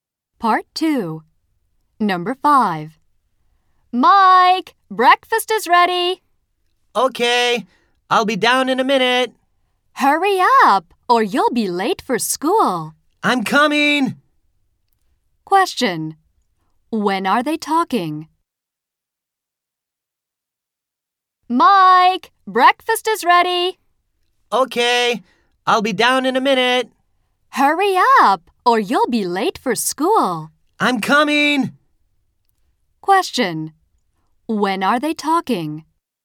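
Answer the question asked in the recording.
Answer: In the morning, before school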